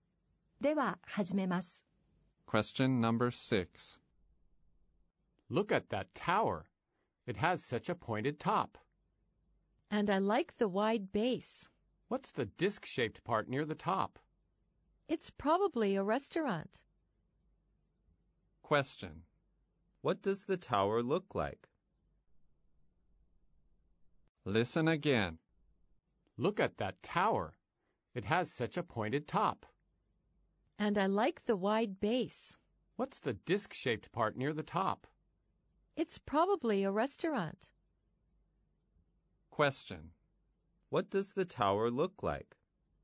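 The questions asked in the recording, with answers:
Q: What does the tower look like?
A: It has a pointed top, a wide base, and a disc-shaped part near the top.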